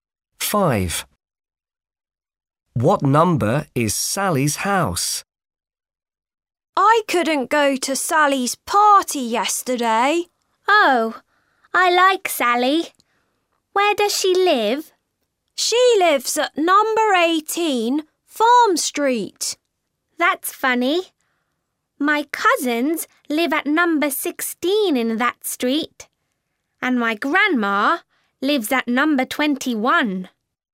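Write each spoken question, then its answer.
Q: What number is Sally's house?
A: 18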